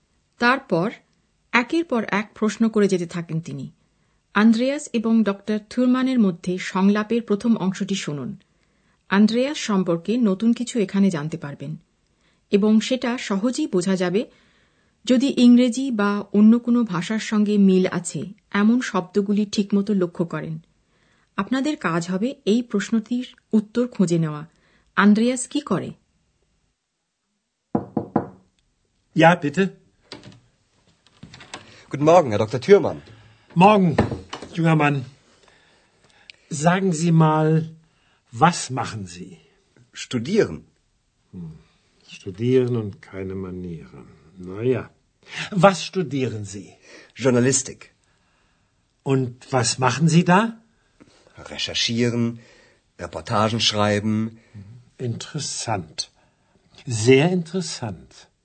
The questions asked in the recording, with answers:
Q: আন্দ্রেয়াস কি করে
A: Musste Andreas সাংবাদিকতা পড়ে